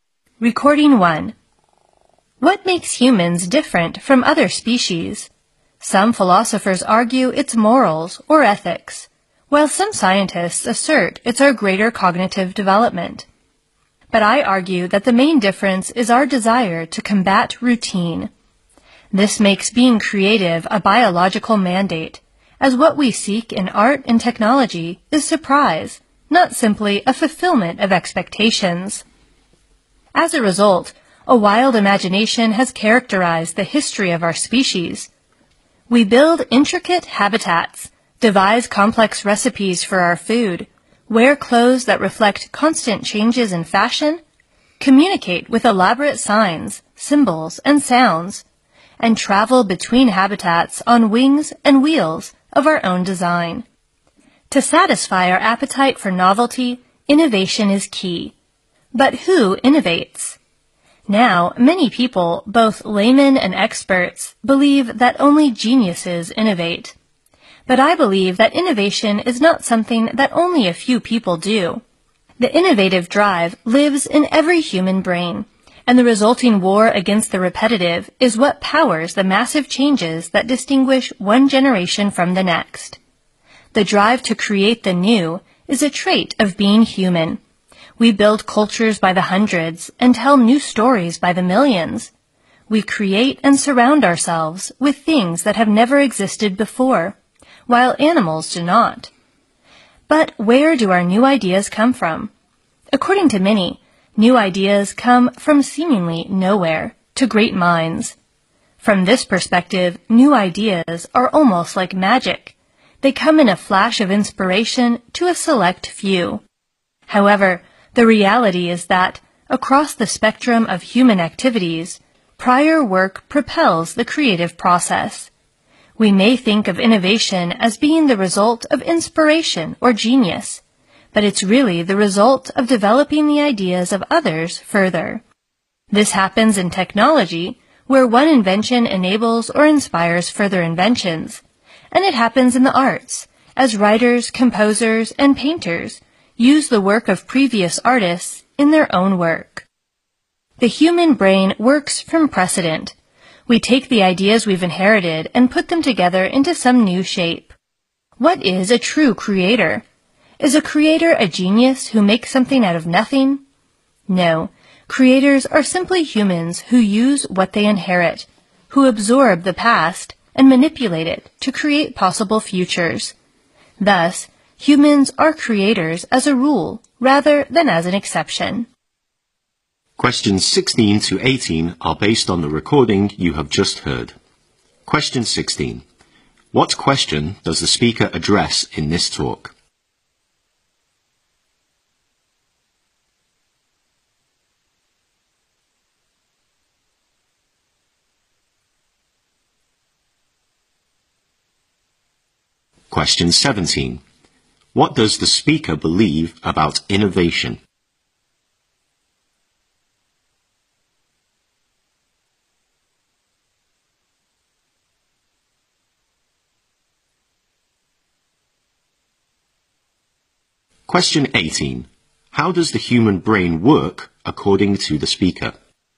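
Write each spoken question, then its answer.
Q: What question does the speaker address in this talk?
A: What makes humans different from other species.

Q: What does the speaker believe about innovation?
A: It is not limited to geniuses; the innovative drive lives in every human brain.

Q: How does the human brain work according to the speaker?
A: It works from precedent.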